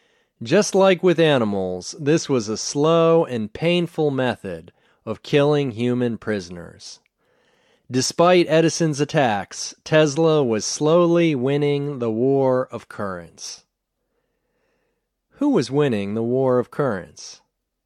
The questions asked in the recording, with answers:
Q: Who was winning the War of Currents?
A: Tesla was winning the War of Currents.